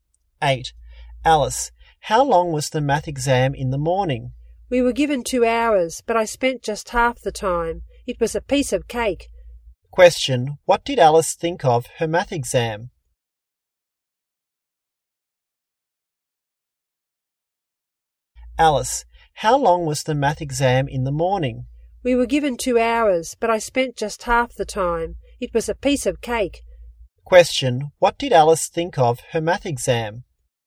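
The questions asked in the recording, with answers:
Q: Question, what did Alice think of her math exam?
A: It was very easy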